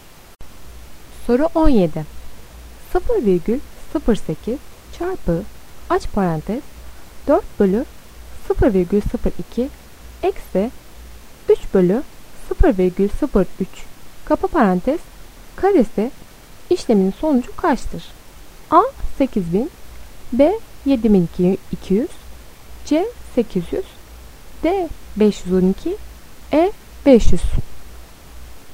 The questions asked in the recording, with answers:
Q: 0,08 çarpı aç parantez 4 bölü 0,02 eksi 3 bölü 0,03 kapa parantez karesi işleminin sonucu kaçtır?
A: Doğru cevap C 800.